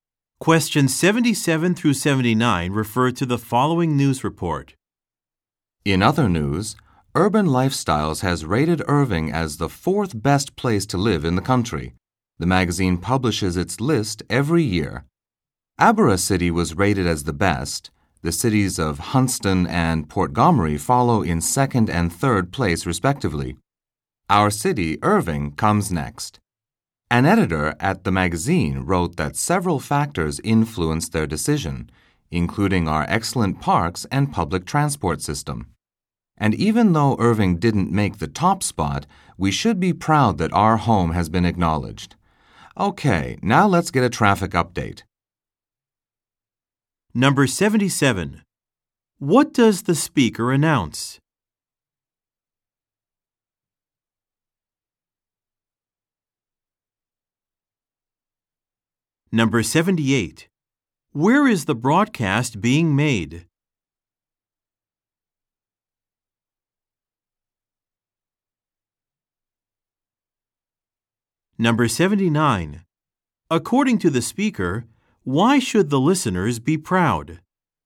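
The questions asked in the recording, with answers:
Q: What does the speaker announce?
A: Irving was rated the fourth best place to live

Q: Where is the broadcast being made?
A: In Irving

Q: According to the speaker, why should the listeners be proud?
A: Their city has been acknowledged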